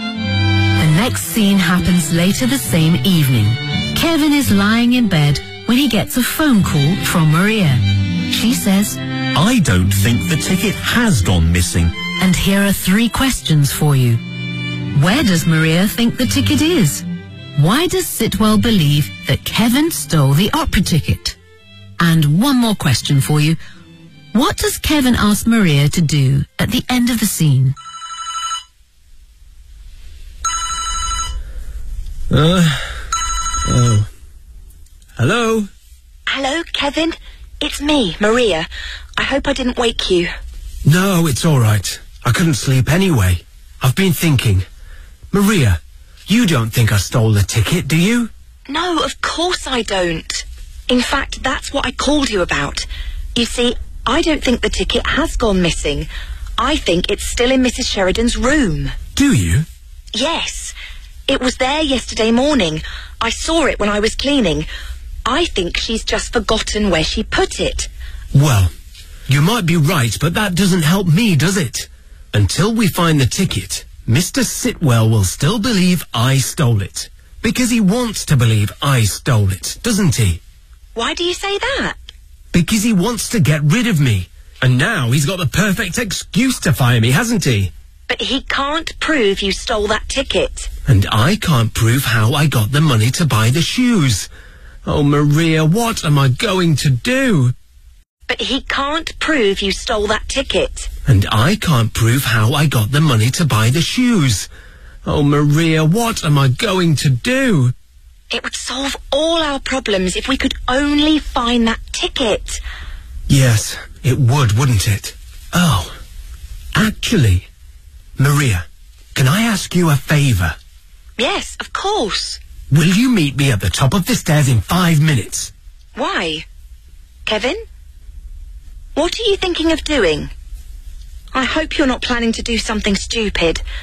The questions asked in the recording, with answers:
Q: Where does Maria think the ticket is?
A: I think it's still in Mrs.

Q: Why does Sitwell believe that Kevin stole the opera ticket?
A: because he wants to get rid of me.